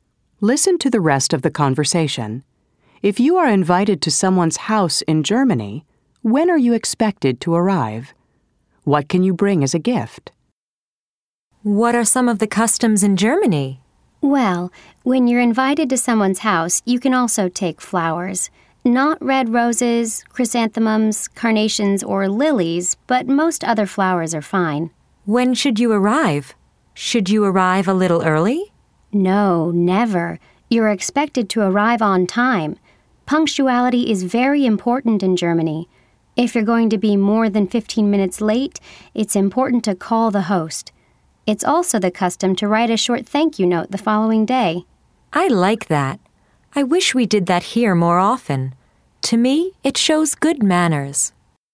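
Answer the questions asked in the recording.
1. On time (never early)
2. Flowers (but not red roses, chrysanthemums, carnations or lilies)
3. Being on time; calling the host if you'll be more than 15 minutes late; writing a short thank-you note the next day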